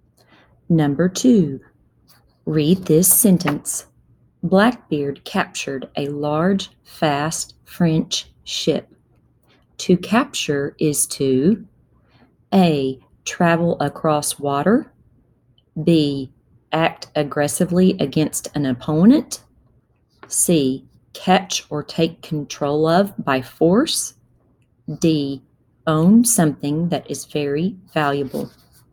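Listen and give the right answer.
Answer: C: Catch or take control of by force.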